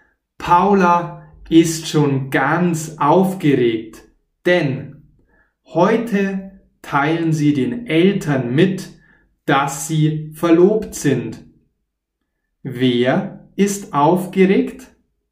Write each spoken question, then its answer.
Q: Wer ist aufgeregt?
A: Paula. Paula ist aufgeregt.